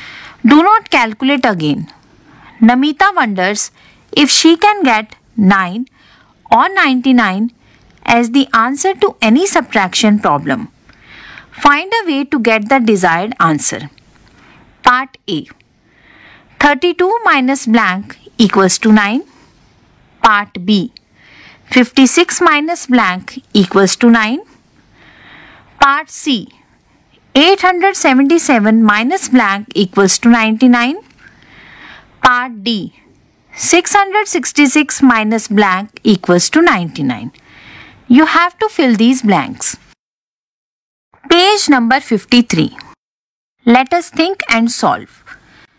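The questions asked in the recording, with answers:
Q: Part A. 32 minus blank equals to 9.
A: 23

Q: Part B. 56 minus blank equals to 9.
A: 47

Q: Part C. 877 minus blank equals to 99.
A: 778

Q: Part D. 666 minus blank equals to 99.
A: 567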